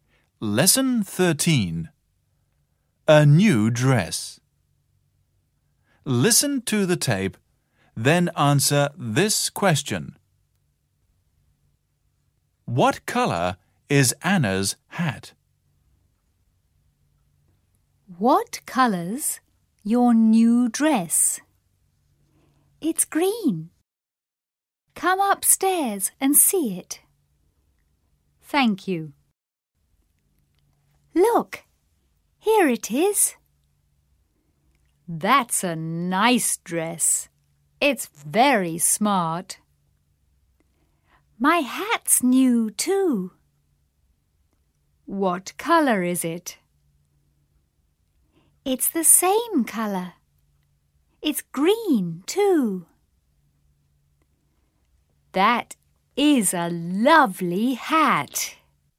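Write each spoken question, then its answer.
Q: What color is Anna's hat?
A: Green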